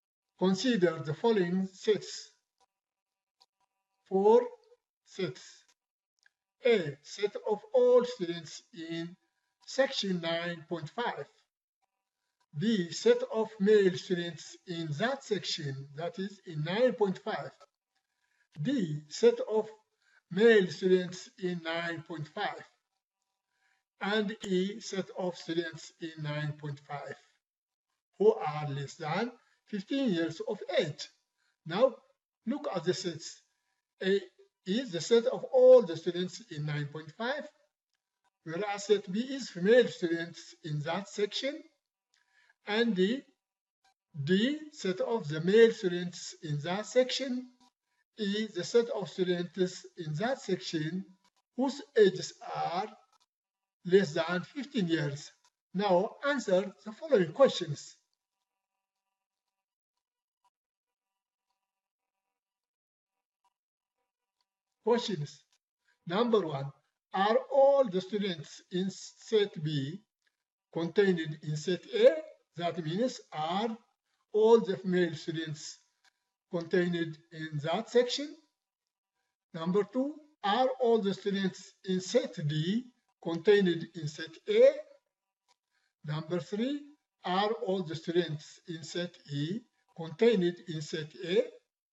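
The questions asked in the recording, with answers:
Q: are all the students in set B contained in set A?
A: Yes

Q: are all the students in set D contained in set A?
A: Yes

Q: are all the students in set E contained in set A?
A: Yes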